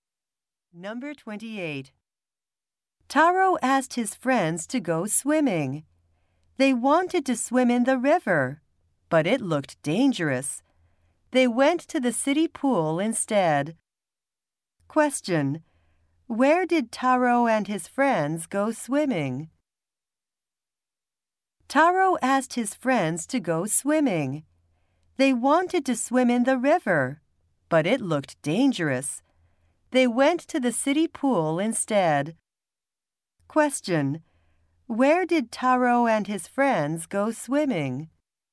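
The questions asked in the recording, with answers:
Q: Where did Taro and his friends go swimming?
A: At the city pool.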